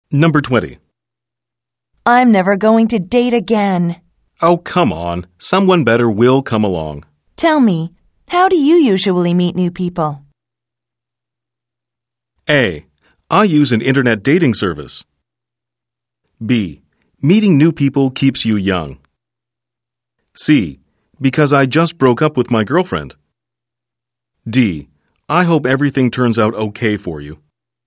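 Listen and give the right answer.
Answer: A: I use an internet dating service.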